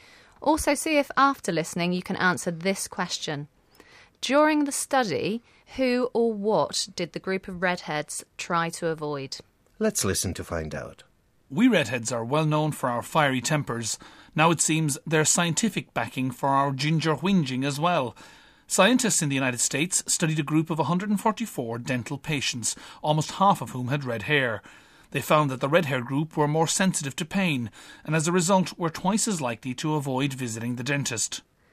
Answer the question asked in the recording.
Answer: they even try to avoid visiting dentists.